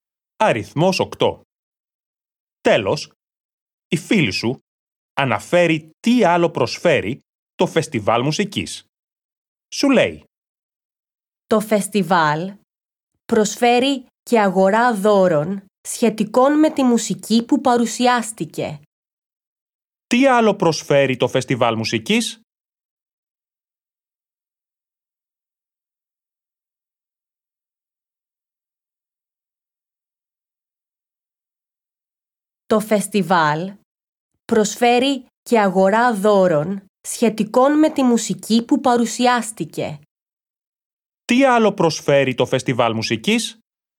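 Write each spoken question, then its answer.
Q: Τι άλλο προσφέρει το Φεστιβάλ Μουσικής?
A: Αγορά δώρων σχετικών με τη μουσική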